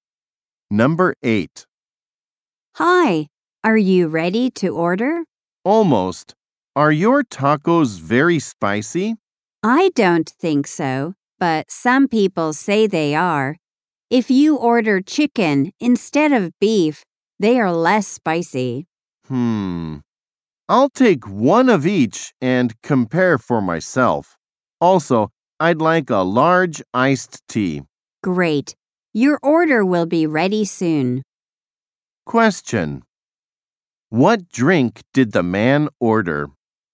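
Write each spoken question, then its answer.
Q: What drink did the man order?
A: A large iced tea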